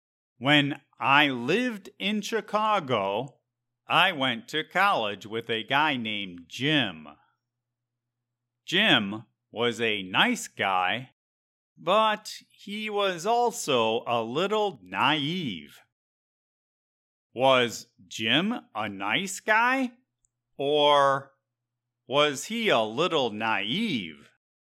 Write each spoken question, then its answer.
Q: Was Jim a nice guy? Or was he a little naive?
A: Both. Jim was a nice guy who was also a little naive.